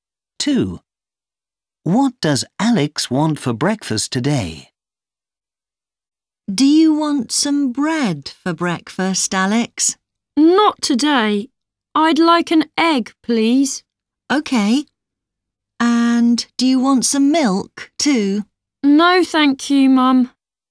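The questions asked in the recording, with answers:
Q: What does Alex want for breakfast today?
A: an egg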